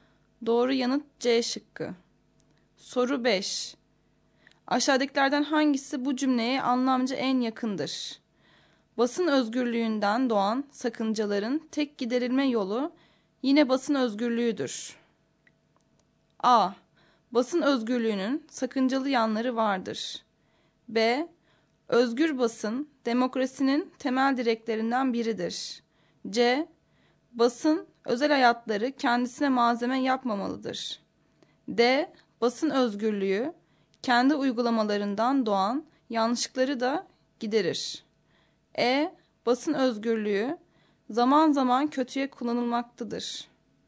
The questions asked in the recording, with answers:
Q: Aşağıdakilerden hangisi bu cümleye anlamca en yakındır?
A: Doğru yanıt D şıkkı.